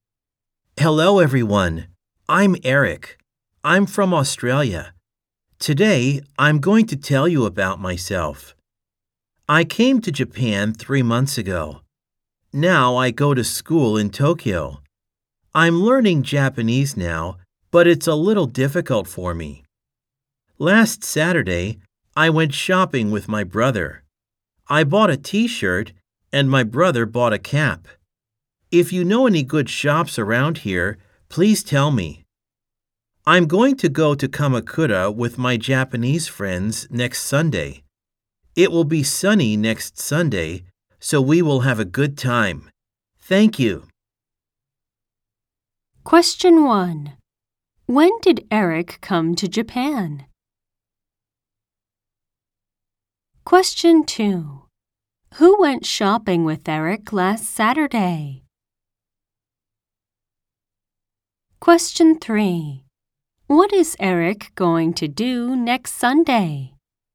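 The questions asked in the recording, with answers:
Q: When did Eric come to Japan?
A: 3 months ago

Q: Who went shopping with Eric last Saturday?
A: His brother

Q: What is Eric going to do next Sunday?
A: Go to Kamakura with his Japanese friends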